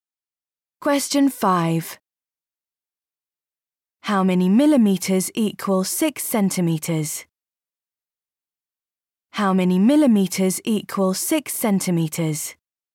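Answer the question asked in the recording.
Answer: 60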